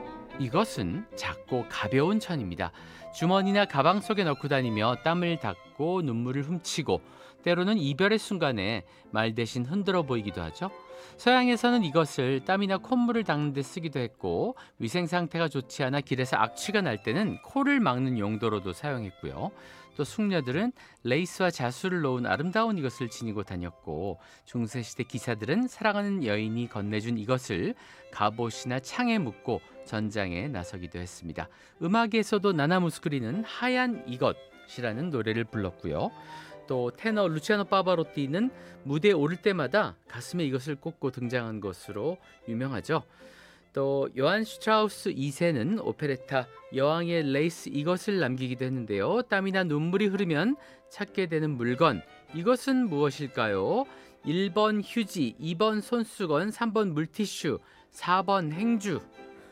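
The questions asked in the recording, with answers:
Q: 땀이나 눈물이 흐르면 찾게 되는 물건, 이것은 무엇일까요?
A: 2: 손수건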